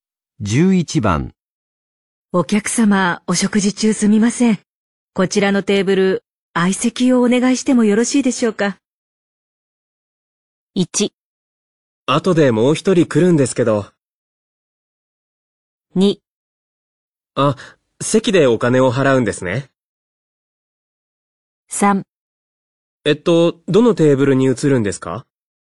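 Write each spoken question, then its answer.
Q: お客様、お食事中すみません。こちらのテーブル、相席をお願いしてもよろしいでしょうか。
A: 1: 後でもう一人来るんですけど。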